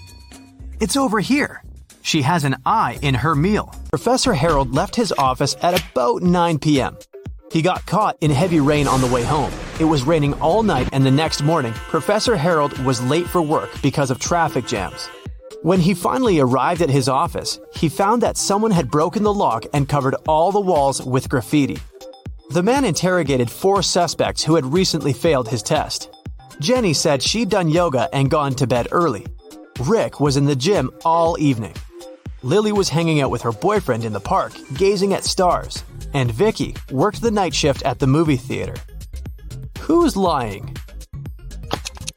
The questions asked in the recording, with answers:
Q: Who's lying?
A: It's Lily.